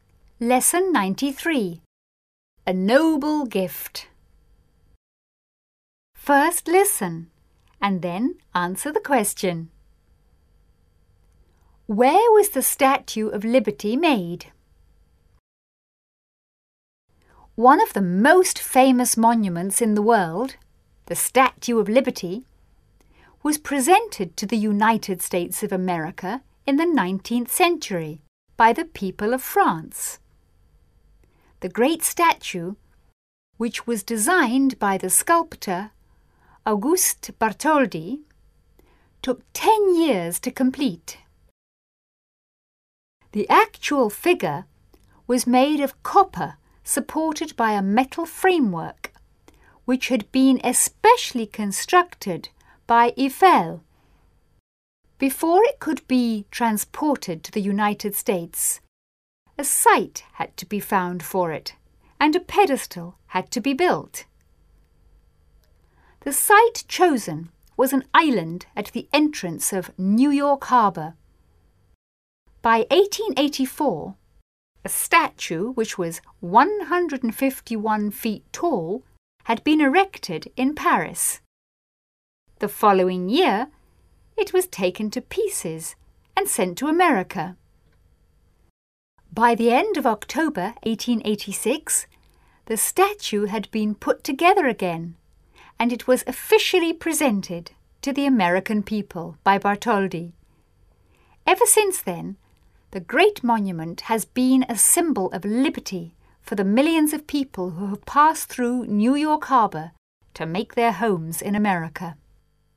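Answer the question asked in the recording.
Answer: In Paris, France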